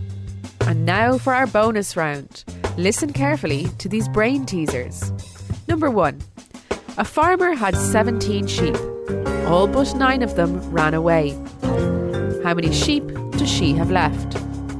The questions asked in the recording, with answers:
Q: How many sheep does she have left?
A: The answer is 9.